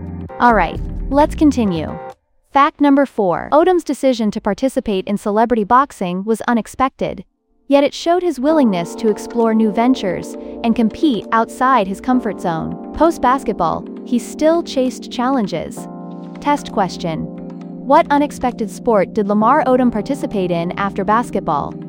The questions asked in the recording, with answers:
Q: What unexpected sport did Lamar Odom participate in after basketball?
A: Correct answer? Celebrity boxing.